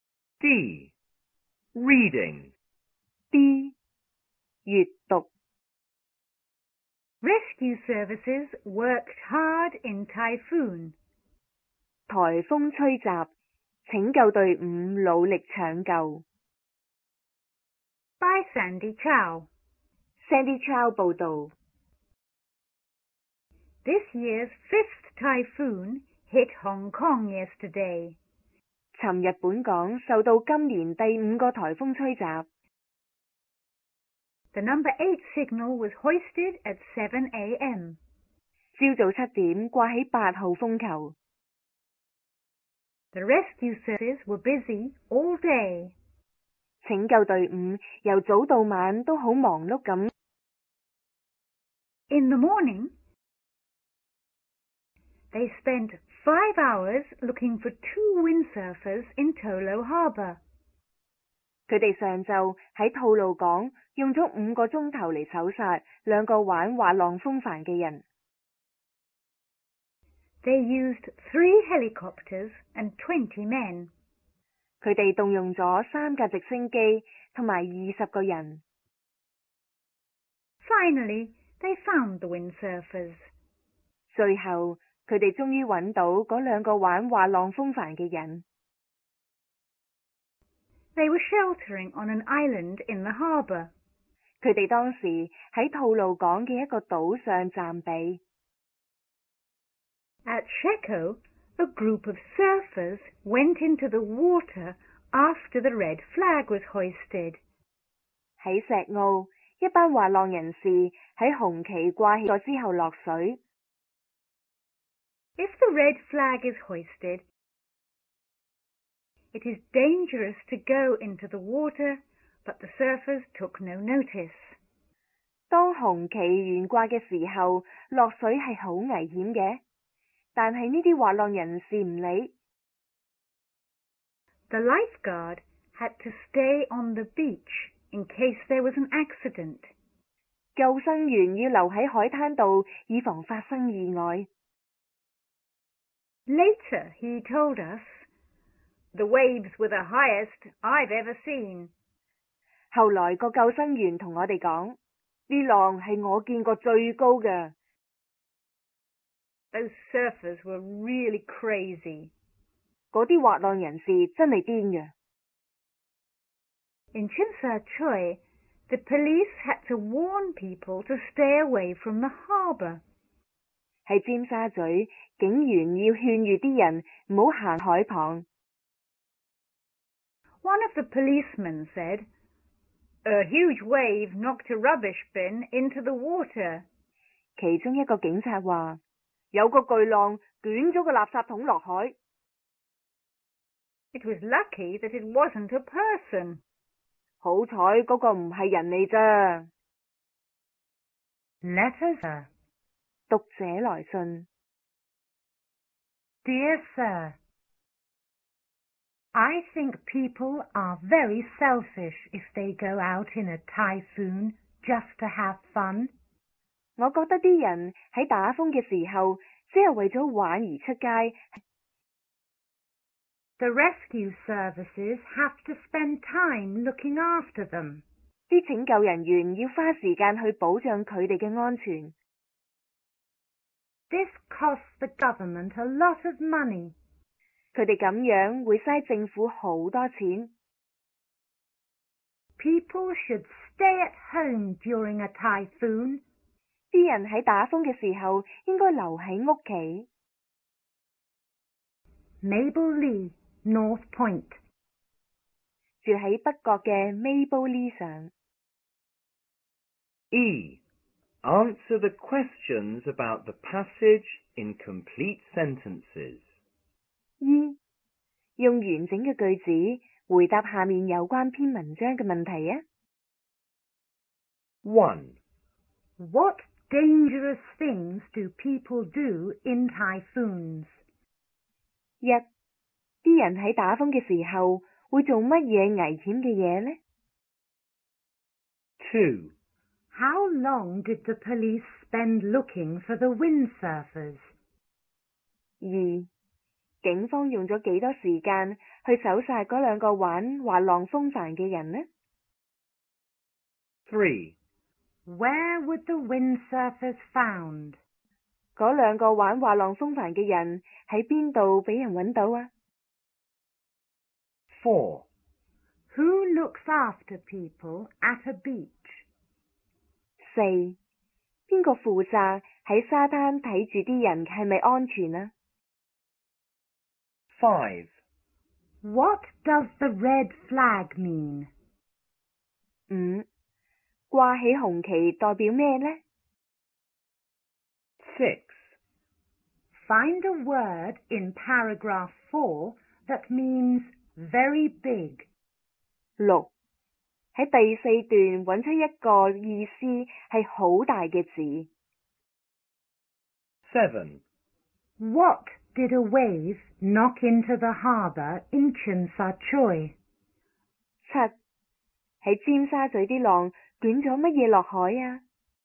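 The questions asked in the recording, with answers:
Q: What dangerous things do people do in typhoons?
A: They go windsurfing or surfing in the sea.

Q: How long did the police spend looking for the windsurfers?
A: 5 hours

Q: Where would the windsurfers found?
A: On an island in Tolo Harbour

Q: Who looks after people at a beach?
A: The lifeguard

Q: What does the red flag mean?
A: It is dangerous to go into the water.

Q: Find a word in paragraph 4 that means very big.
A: huge

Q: What did a wave knock into the harbour in Tsim Sha Tsui?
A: A rubbish bin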